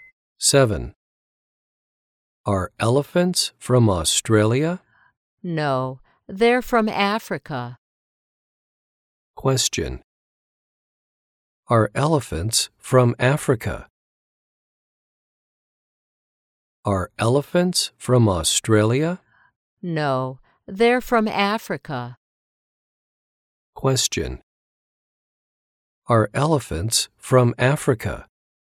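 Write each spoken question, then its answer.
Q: Are elephants from Africa?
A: Yes, they are.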